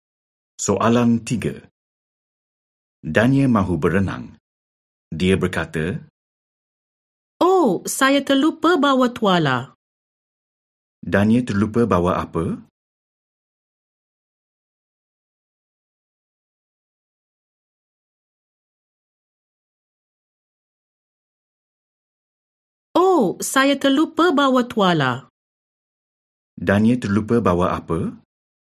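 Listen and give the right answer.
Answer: Tuala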